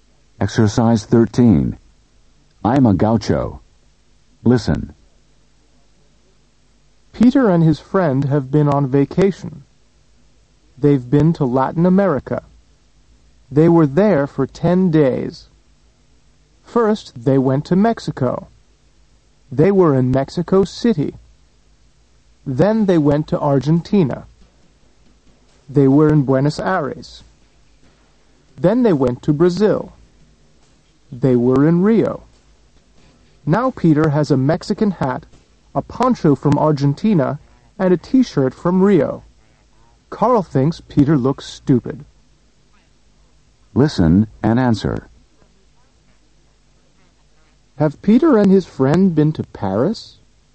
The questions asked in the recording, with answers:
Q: Have Peter and his friend been to Paris?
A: No, they haven't.